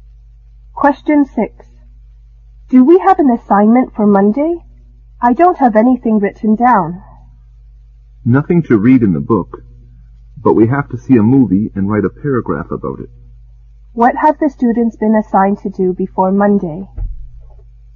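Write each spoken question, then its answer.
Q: What have the students been assigned to do before Monday?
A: See a movie and write a paragraph about it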